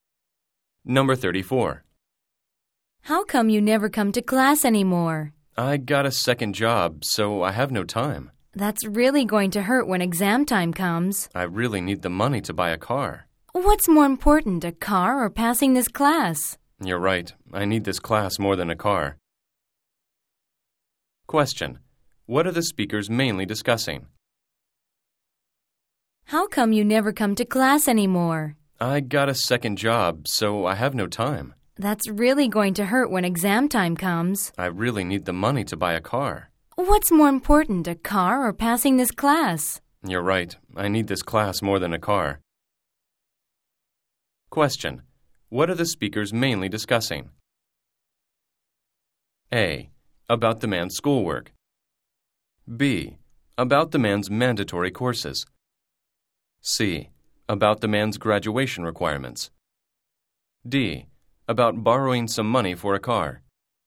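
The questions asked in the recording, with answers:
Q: What are the speakers mainly discussing?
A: A: About the man's schoolwork.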